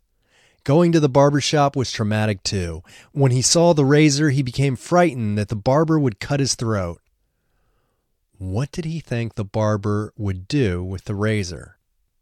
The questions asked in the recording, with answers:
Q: What did he think the barber would do with the razor?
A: He thought the barber would cut his throat.